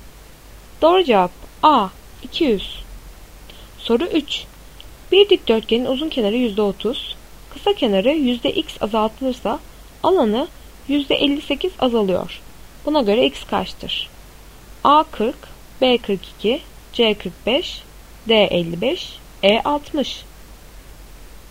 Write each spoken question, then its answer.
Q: Buna göre x kaçtır?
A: Doğru cevap A 40.